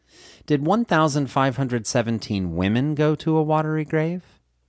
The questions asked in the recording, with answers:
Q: Did 1,517 women go to a watery grave?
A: No, 1,517 women, men, and children went to a watery grave.